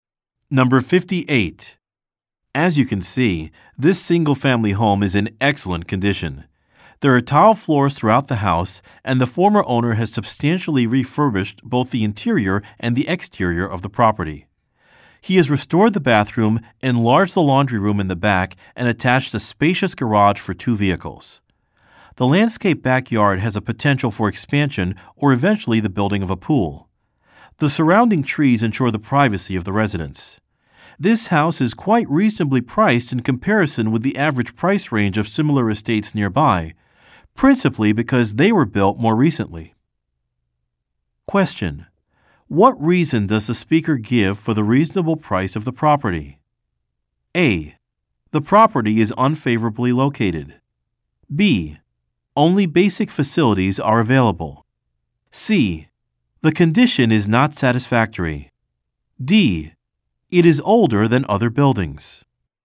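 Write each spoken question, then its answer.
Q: What reason does the speaker give for the reasonable price of the property?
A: D: It is older than other buildings.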